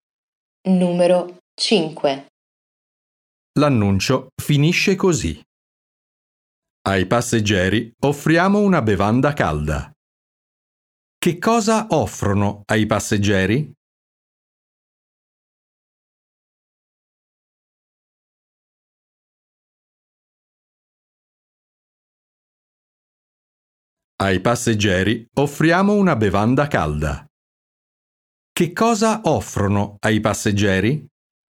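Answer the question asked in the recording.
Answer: Una bevanda calda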